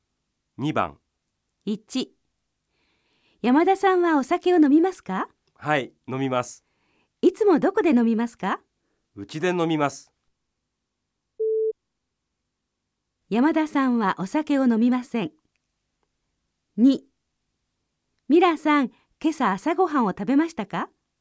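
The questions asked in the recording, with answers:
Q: 山田さんはお酒を飲みません。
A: ×(違います。山田さんはお酒を飲みます)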